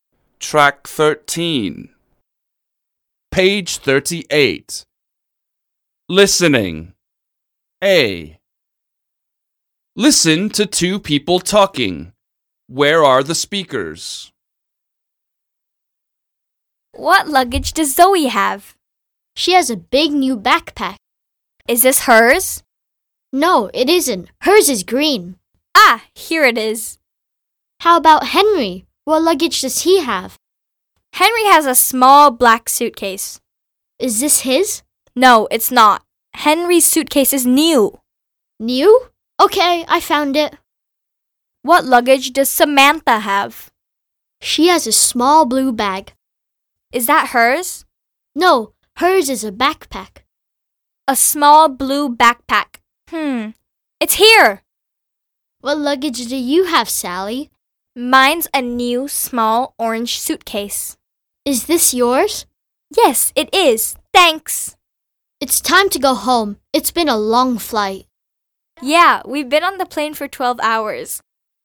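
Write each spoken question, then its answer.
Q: Where are the speakers?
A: At the airport (collecting luggage after a flight)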